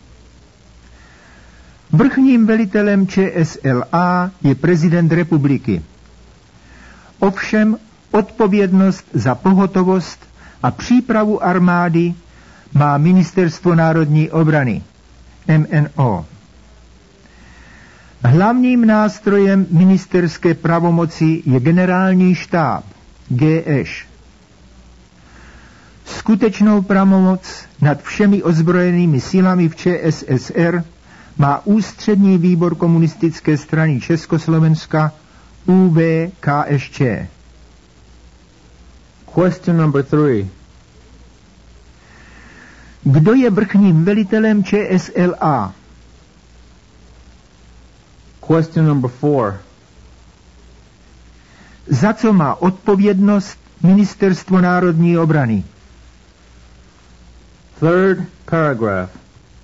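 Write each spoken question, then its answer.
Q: Kdo je vrchním velitelem ČSLA?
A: Prezident republiky

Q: Za co má odpovědnost Ministerstvo národní obrany?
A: Za pohotovost a přípravu armády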